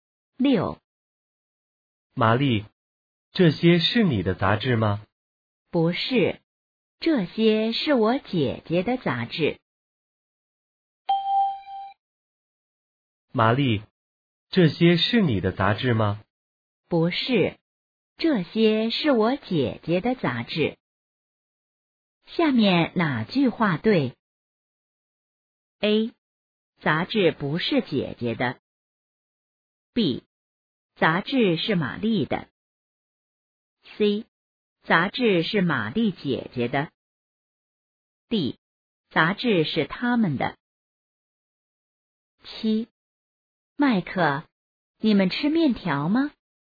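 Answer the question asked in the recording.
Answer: C: 杂志是玛丽姐姐的。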